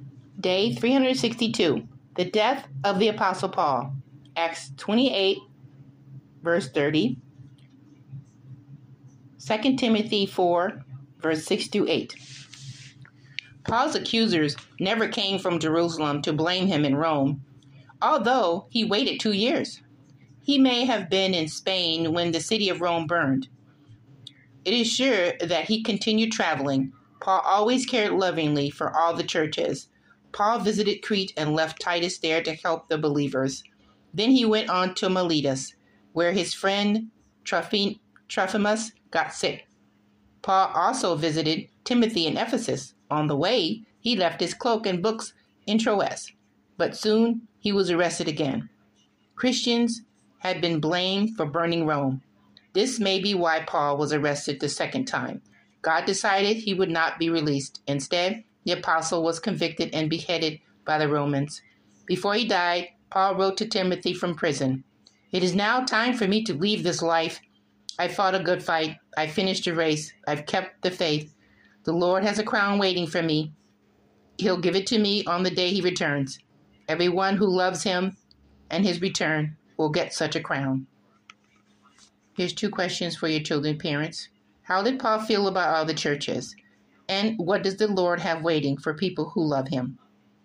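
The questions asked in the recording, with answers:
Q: How did Paul feel about all the churches?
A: He always cared lovingly for them

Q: And what does the Lord have waiting for people who love him?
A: A crown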